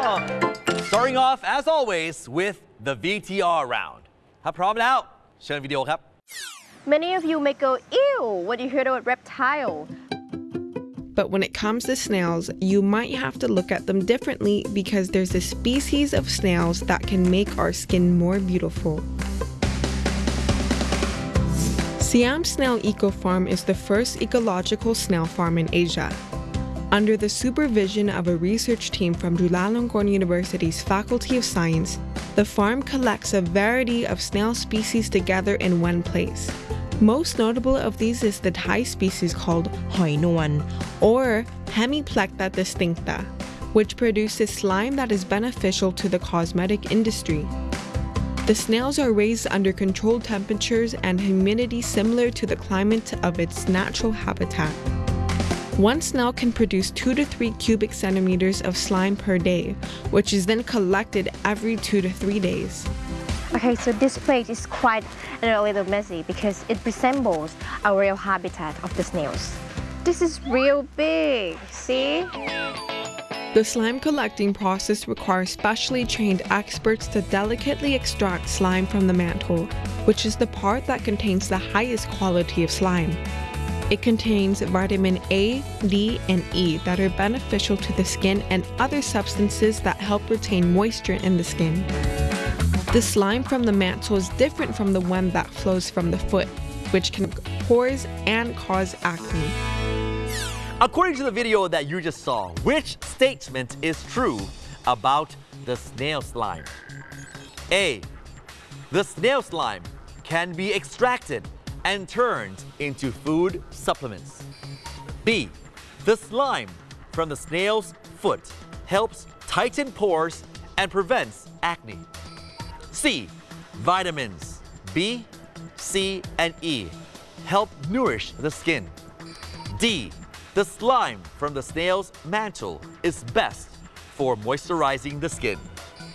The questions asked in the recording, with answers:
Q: According to the video that you just saw, which statement is true about the snail slime?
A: D. The slime from the snail mantle is best for moisturizing the skin.